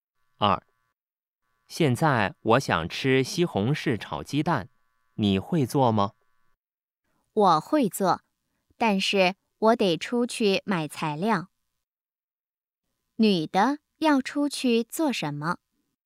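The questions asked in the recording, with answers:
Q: 女的要出去做什么?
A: 买材料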